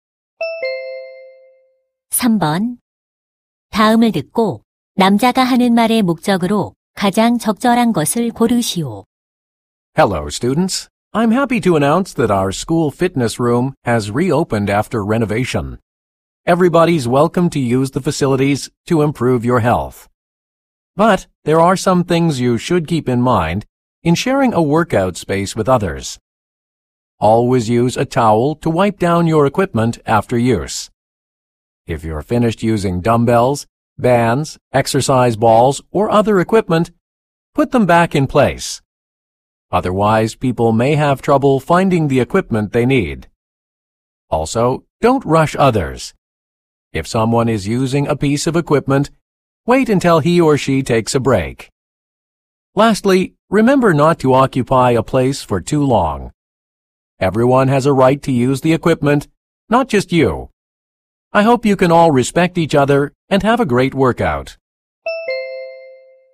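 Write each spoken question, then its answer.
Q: 다음을 듣고 남자가 하는 말의 목적으로 가장 적절한 것을 고르시오.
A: 재개장한 체력단련실 이용 수칙을 안내하려고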